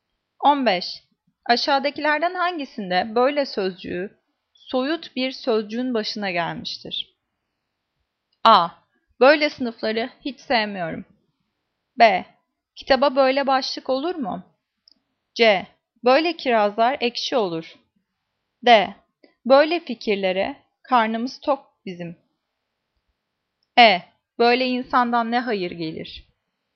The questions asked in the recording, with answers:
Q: Aşağıdakilerden hangisinde böyle sözcüğü soyut bir sözcüğün başına gelmiştir?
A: Cevap D. Böyle fikirlere karnımız tok bizim.